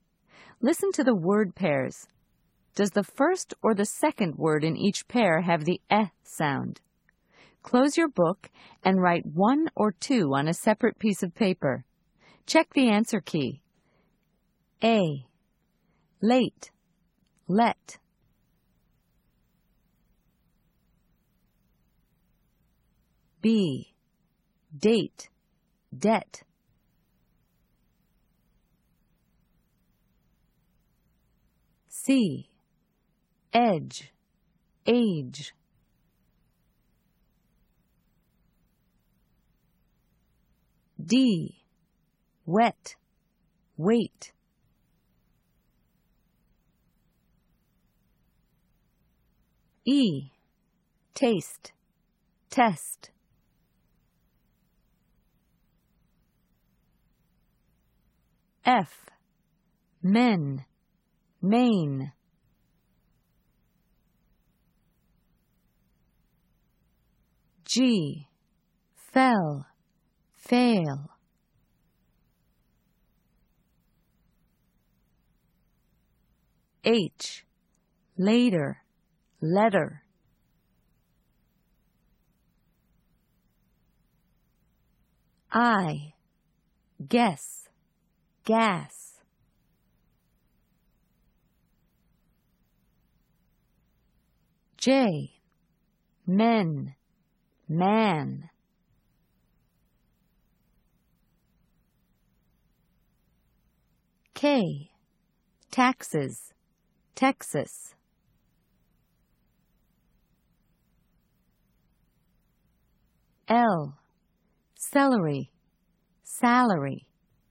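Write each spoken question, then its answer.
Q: Does the first or the second word in each pair have the eh sound?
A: second (let)

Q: Does the first or the second word in each pair have the eh sound?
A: second (debt)

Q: Does the first or the second word in each pair have the eh sound?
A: first (edge)

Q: Does the first or the second word in each pair have the eh sound?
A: first (wet)

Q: Does the first or the second word in each pair have the eh sound?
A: second (test)

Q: Does the first or the second word in each pair have the eh sound?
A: first (men)

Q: Does the first or the second word in each pair have the eh sound?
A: first (fell)

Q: Does the first or the second word in each pair have the eh sound?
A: second (letter)

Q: Does the first or the second word in each pair have the eh sound?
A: first (guess)

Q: Does the first or the second word in each pair have the eh sound?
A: first (men)

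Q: Does the first or the second word in each pair have the eh sound?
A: second (Texas)

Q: Does the first or the second word in each pair have the eh sound?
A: first (celery)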